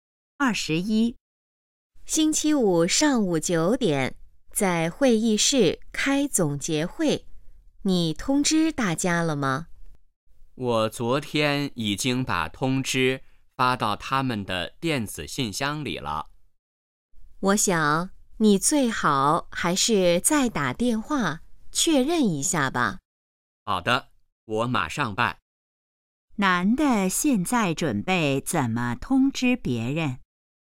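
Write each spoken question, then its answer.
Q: 男的现在准备怎么通知别人?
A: 打电话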